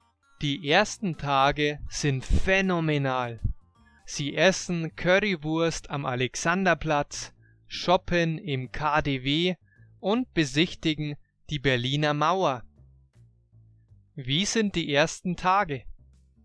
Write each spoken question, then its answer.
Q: Wie sind die ersten Tage?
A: Phänomenal. Die ersten Tage sind phänomenal.